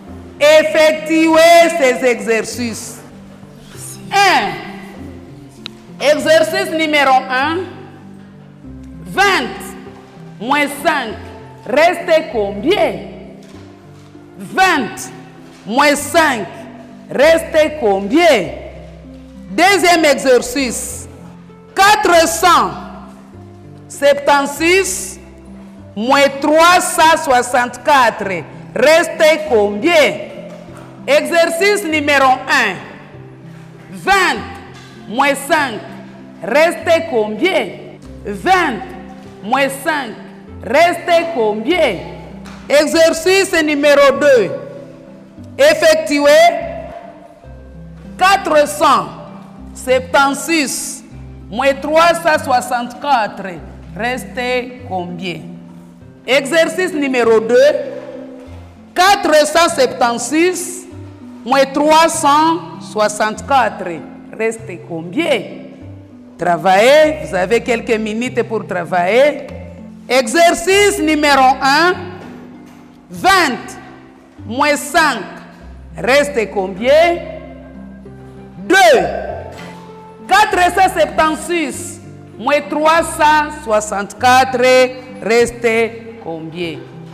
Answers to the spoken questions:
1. 20 moins 5, reste 15.
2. 476 moins 364 égale 112.